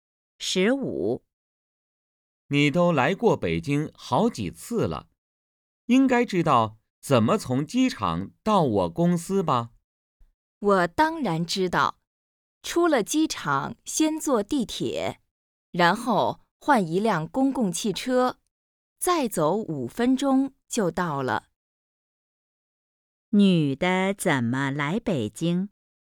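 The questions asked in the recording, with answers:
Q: 女的怎么来北京?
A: 坐飞机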